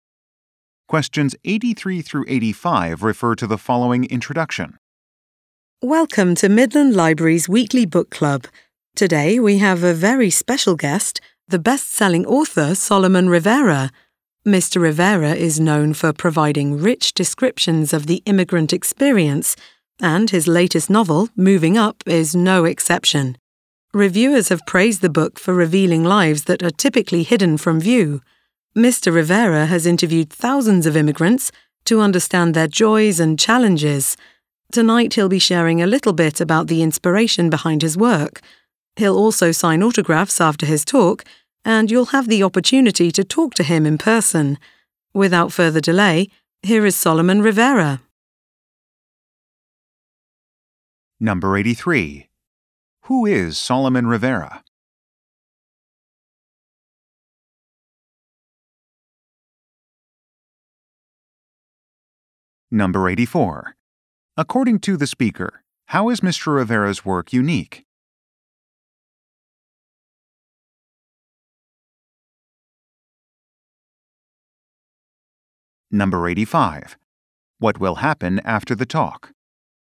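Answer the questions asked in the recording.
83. A best-selling author
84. It reveals lives of immigrants that are typically hidden from view
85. He will sign autographs and talk with people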